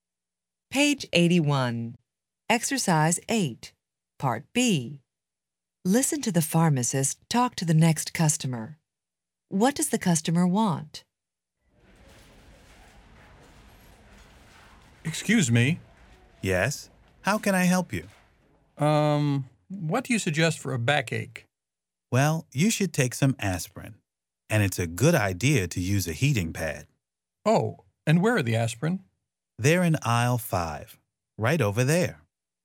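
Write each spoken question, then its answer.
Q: What does the customer want?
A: Something for a backache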